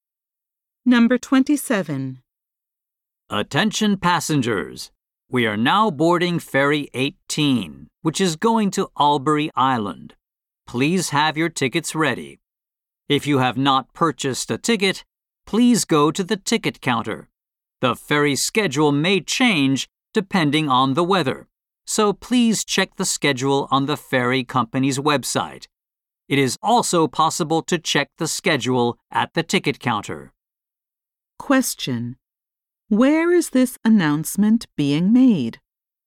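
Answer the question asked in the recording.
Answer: At a ferry terminal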